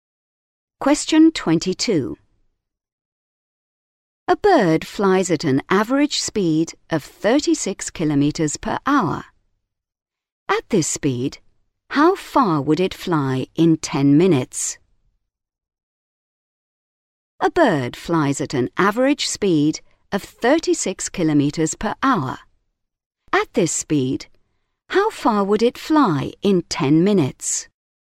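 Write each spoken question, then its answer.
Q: At this speed, how far would it fly in 10 minutes?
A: 6 kilometres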